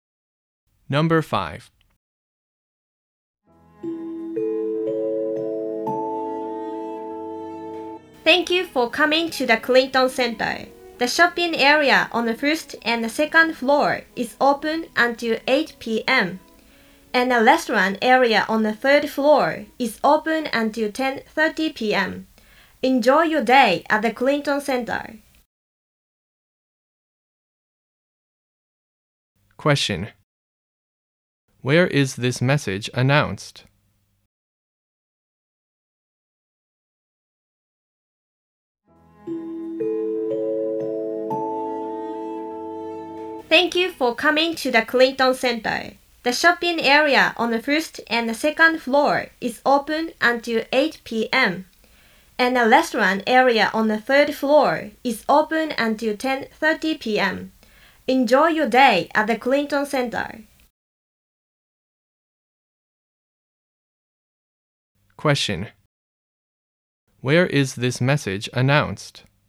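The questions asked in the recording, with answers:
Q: Where is this message announced?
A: At the Clinton Center.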